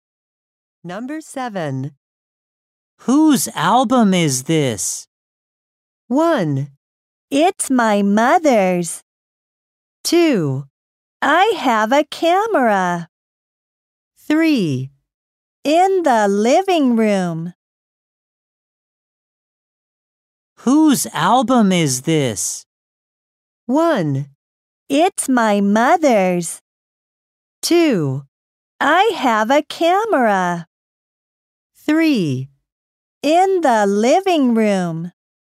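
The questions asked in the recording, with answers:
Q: Whose album is this?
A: 1: It's my mother's.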